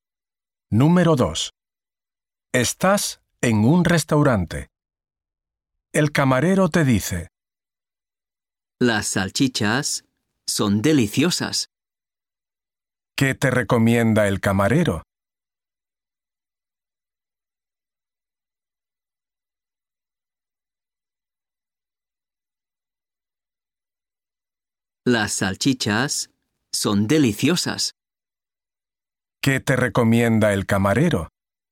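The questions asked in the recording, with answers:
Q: ¿Qué te recomienda el camarero?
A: Las salchichas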